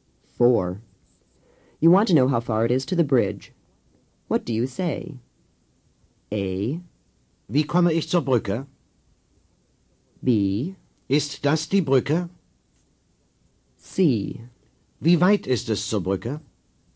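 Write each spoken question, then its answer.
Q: You want to know how far it is to the bridge. What do you say?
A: C: Wie weit ist es zur Brücke?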